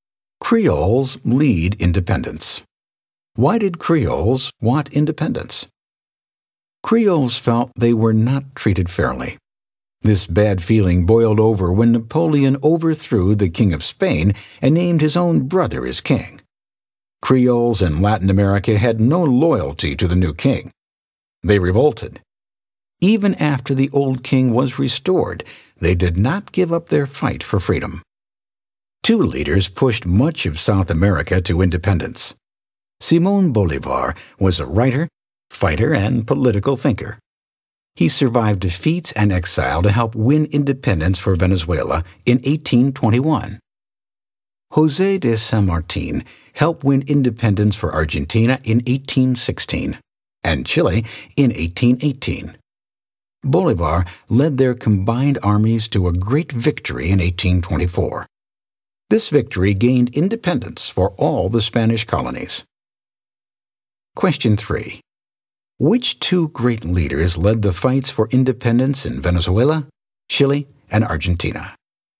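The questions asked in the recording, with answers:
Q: Which two great leaders led the fights for independence in Venezuela, Chile, and Argentina?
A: Simón Bolívar and José de San Martín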